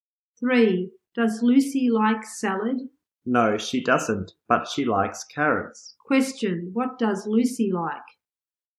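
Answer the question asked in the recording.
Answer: Carrots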